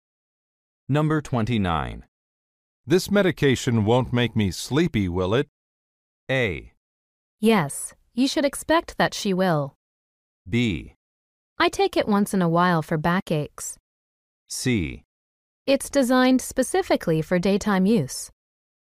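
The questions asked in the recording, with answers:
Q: This medication won't make me sleepy, will it?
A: C: It's designed specifically for daytime use.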